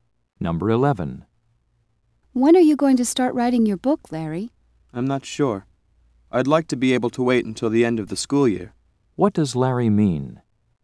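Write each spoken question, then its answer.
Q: What does Larry mean?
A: He wants to wait until the school year ends to start.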